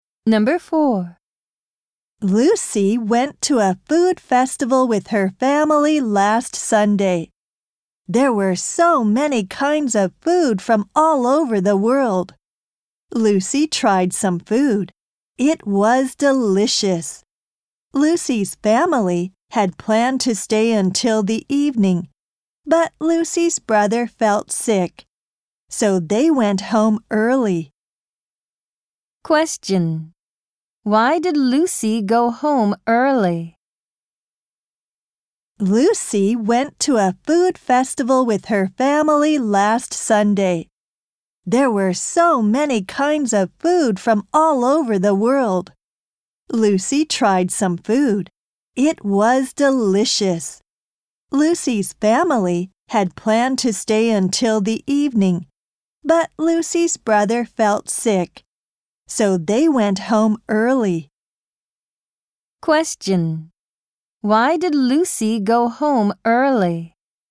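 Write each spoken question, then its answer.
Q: Why did Lucy go home early?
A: Because her brother felt sick.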